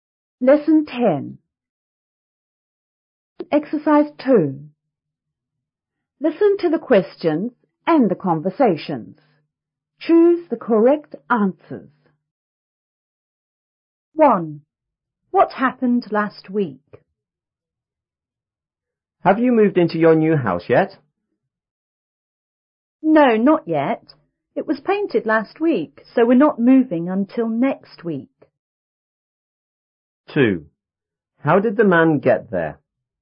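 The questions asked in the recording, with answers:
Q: What happened last week?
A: The house was painted.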